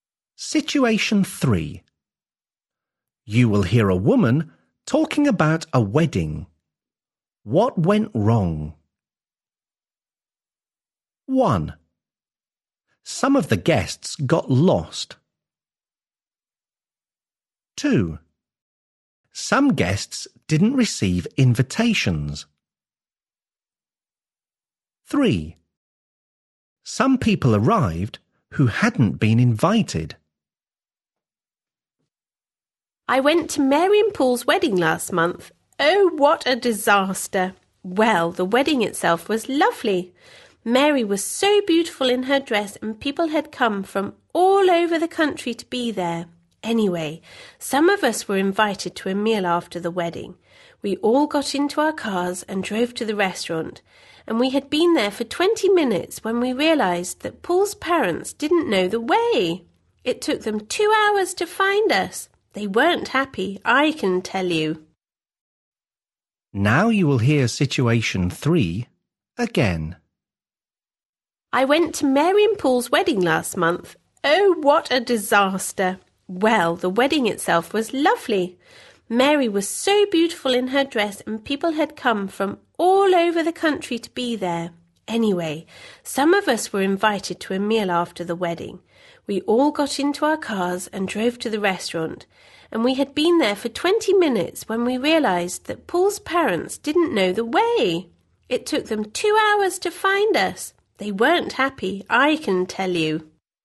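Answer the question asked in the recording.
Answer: 1: Some of the guests got lost.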